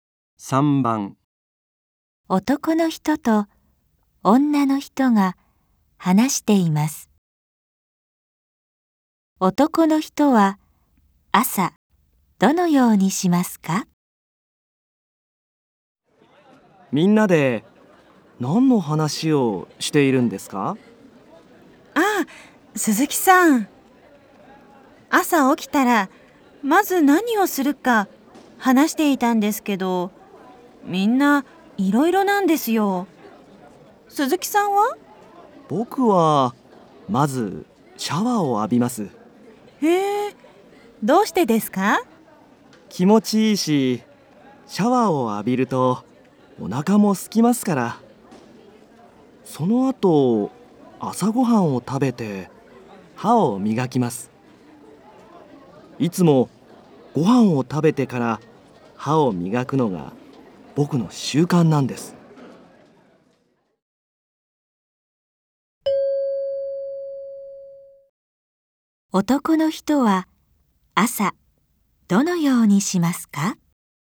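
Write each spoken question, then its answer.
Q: 男の人は朝どのようにしますか?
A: まずシャワーを浴びて、その後朝ごはんを食べてから歯を磨く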